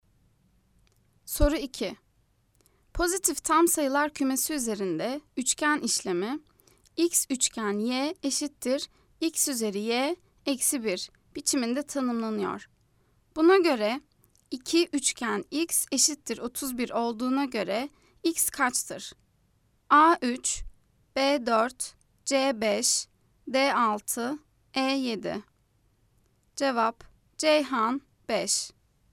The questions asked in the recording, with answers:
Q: Buna göre 2 üçgen x eşittir 31 olduğuna göre x kaçtır?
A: Cevap Ceyhan 5.